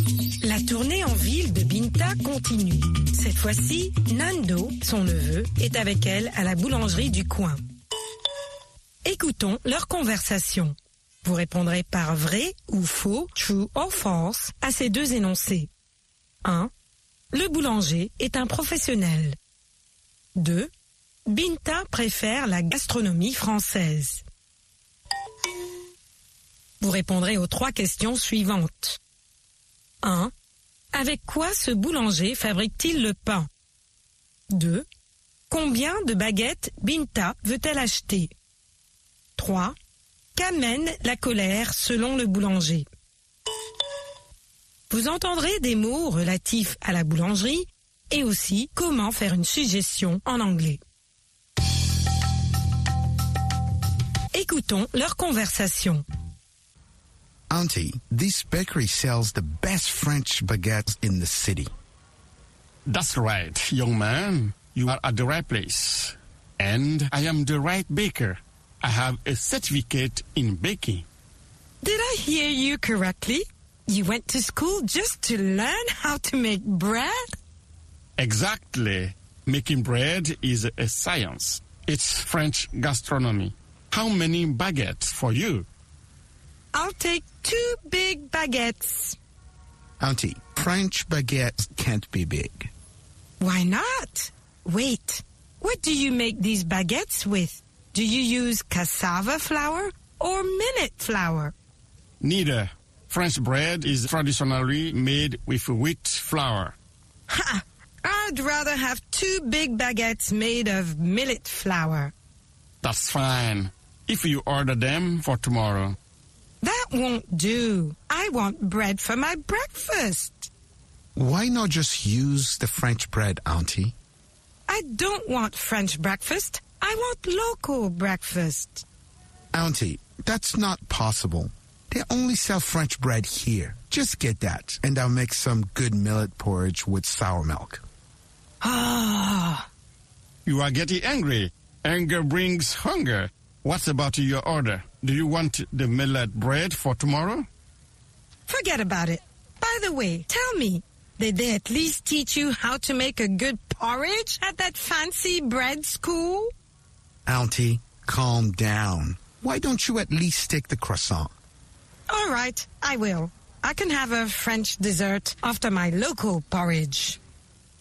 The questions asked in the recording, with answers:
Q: Le boulanger est un professionnel.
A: L'énoncé 1 est vrai. Le boulanger est un professionnel.

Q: Binta préfère la gastronomie française.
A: L'énoncé 2 est faux. Binta préfère la gastronomie française.

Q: Avec quoi ce boulanger fabrique-t-il le pain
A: De la farine de blé.

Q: Combien de baguettes Binta veut-elle acheter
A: Deux baguettes.

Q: Qu'amène la colère selon le boulanger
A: La colère amène la faim.